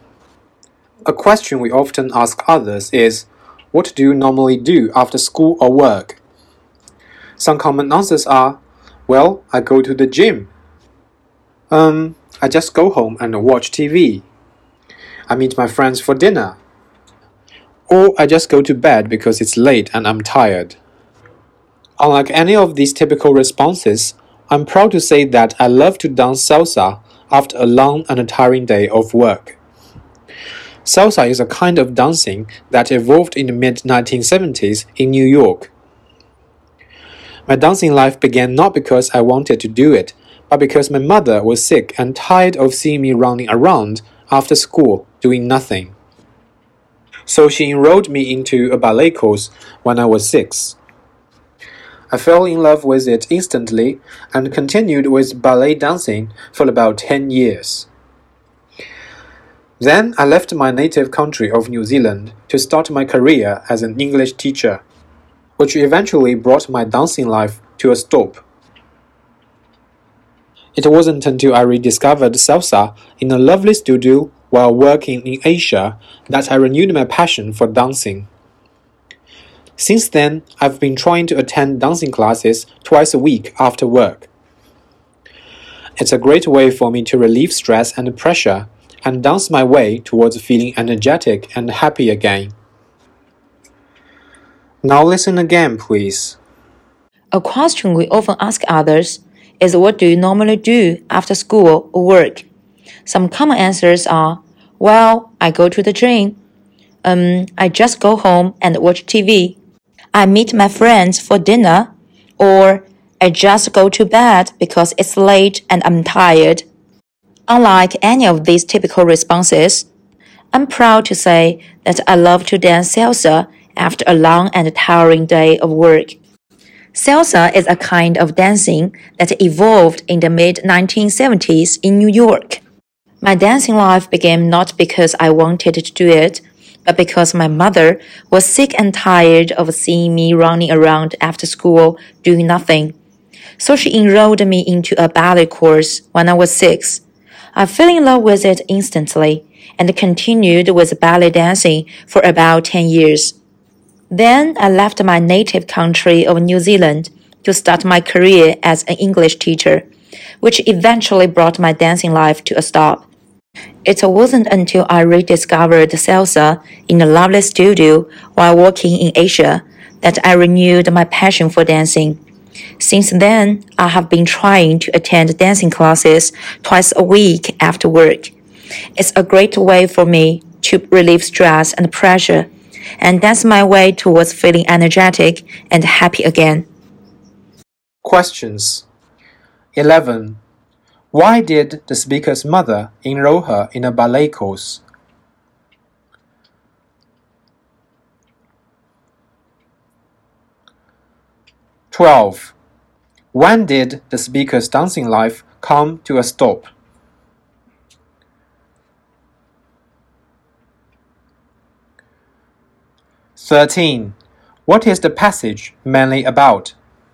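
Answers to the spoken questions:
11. She was tired of seeing her running around after school doing nothing
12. When she left New Zealand to start her career as an English teacher
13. The speaker's dancing life and love of salsa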